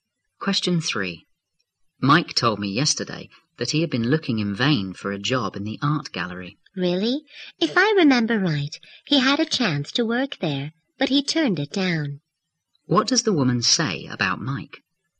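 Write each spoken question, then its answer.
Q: What does the woman say about Mike?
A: He had a chance to work at the gallery but turned it down.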